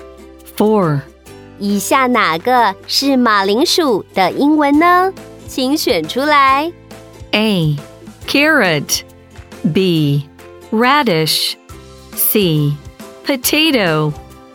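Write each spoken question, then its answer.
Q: 以下哪个是马铃薯的英文呢?请选出来。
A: C: potato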